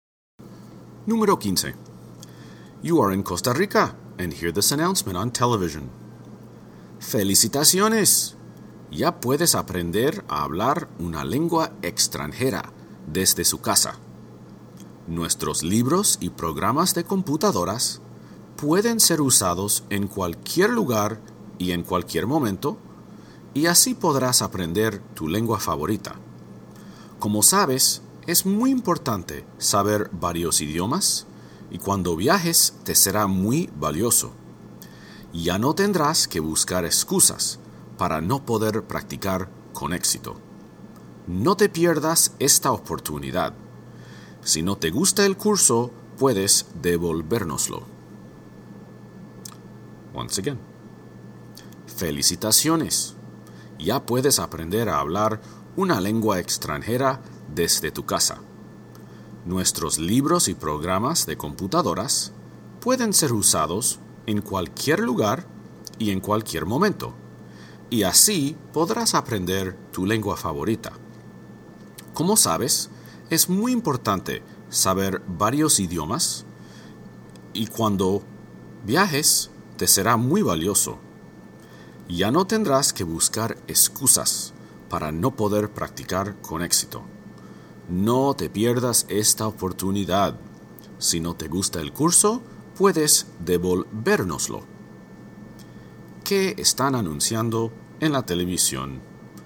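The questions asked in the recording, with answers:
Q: ¿Qué están anunciando en la televisión?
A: Cursos para aprender lenguas extranjeras en casa (libros y programas de computadora)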